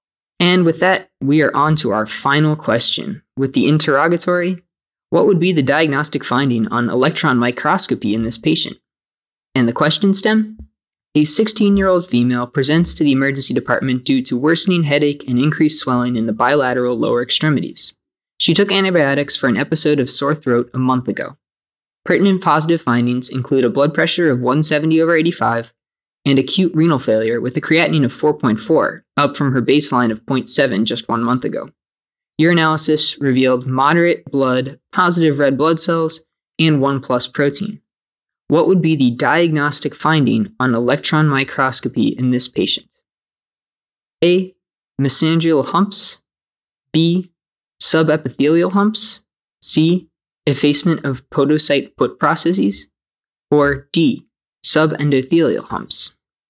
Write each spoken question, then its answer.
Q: What would be the diagnostic finding on electron microscopy in this patient?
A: And the correct answer is B, subepithelial humps.